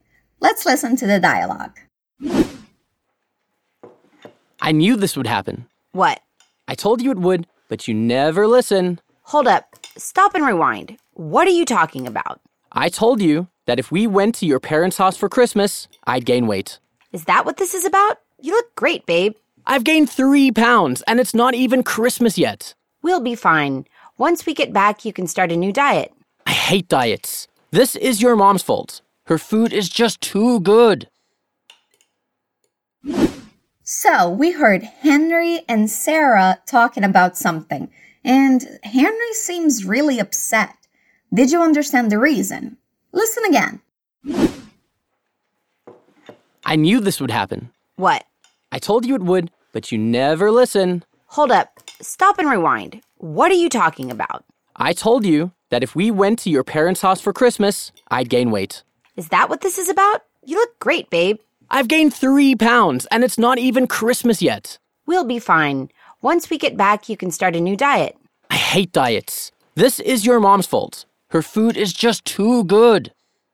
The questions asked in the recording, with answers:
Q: Did you understand the reason?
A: Henry is upset he gained weight.